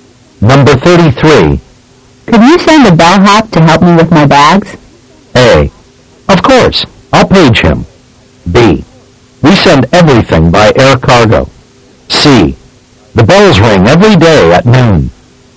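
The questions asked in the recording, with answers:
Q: Could you send a bellhop to help me with my bags?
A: A: Of course. I'll page him.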